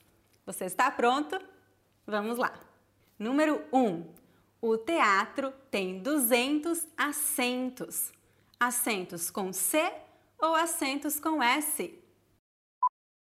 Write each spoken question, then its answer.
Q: Assentos com C ou assentos com S?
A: O teatro tem 200 assentos, assentos com S.